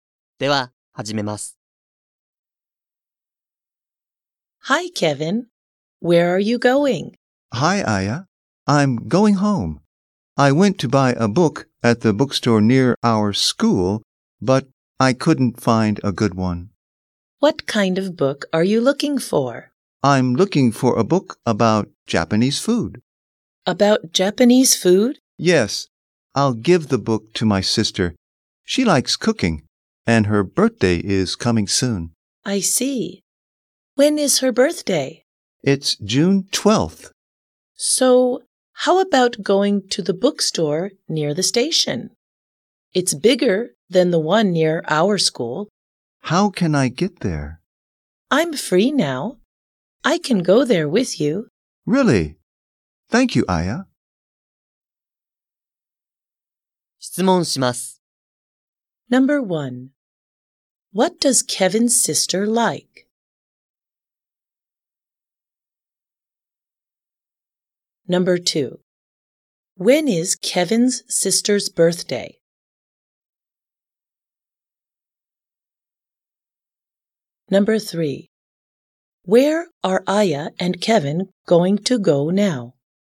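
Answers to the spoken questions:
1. Cooking
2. June 12th
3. To the bookstore near the station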